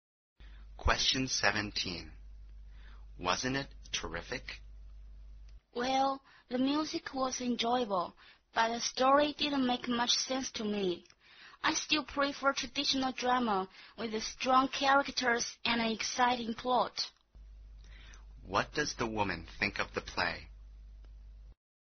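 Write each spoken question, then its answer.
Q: What does the woman think of the play?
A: The music was enjoyable but the story didn't make much sense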